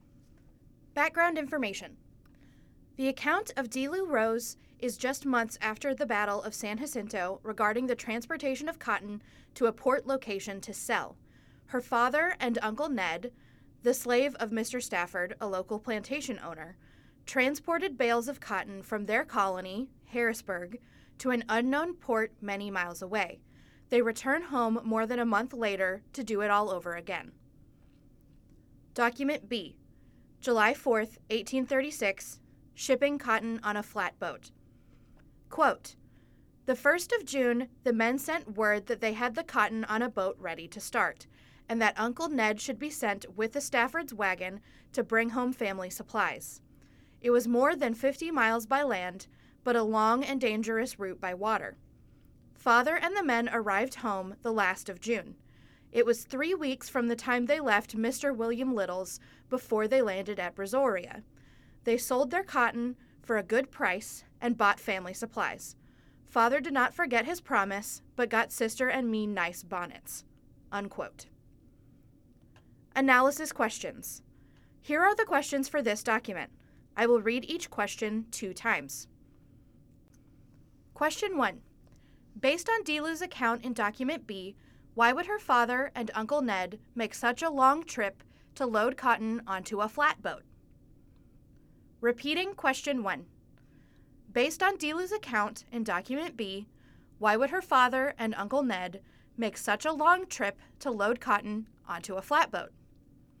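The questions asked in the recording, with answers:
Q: Based on Delew's account in Document B, why would her father and Uncle Ned make such a long trip to load cotton onto a flatboat?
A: To ship the cotton to port, sell it for a good price and buy family supplies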